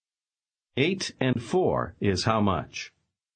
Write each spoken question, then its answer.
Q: Eight and four is how much?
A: 12.